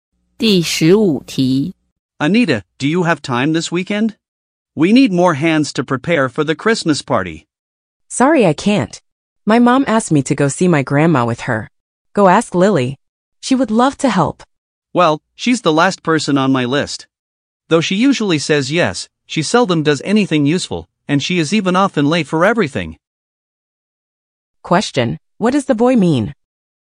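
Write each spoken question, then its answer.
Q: what does the boy mean?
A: He doesn't want to ask Lily for help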